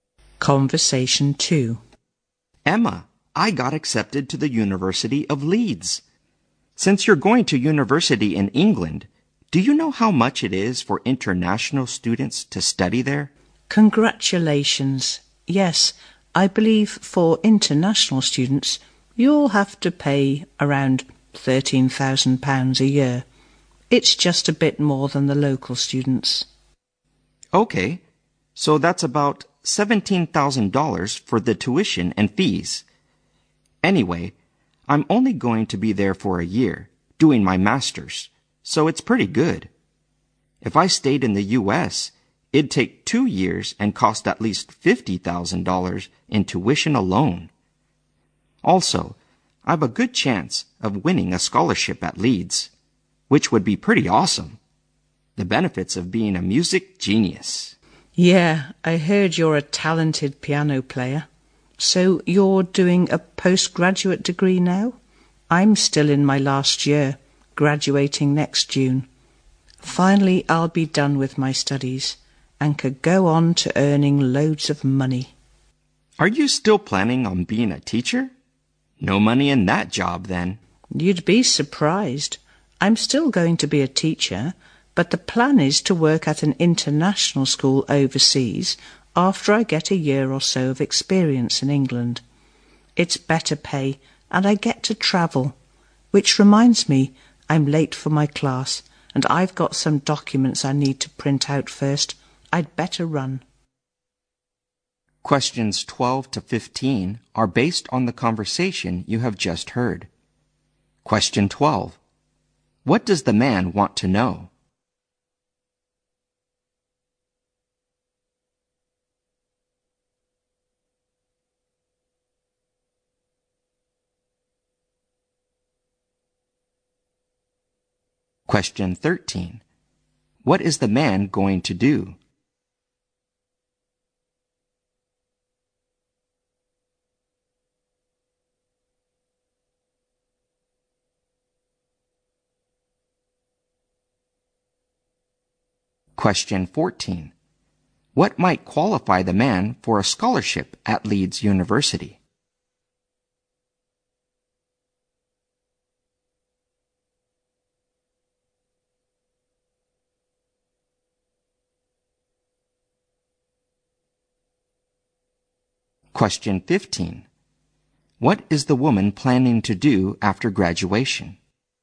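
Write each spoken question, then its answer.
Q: What does the man want to know?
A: How much it costs for international students to study in England.

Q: What is the man going to do?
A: Do a one-year master's degree at the University of Leeds.

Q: What might qualify the man for a scholarship at Leeds University?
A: His musical talent.

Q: What is the woman planning to do after graduation?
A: Be a teacher, gain experience in England, and then teach at an international school overseas.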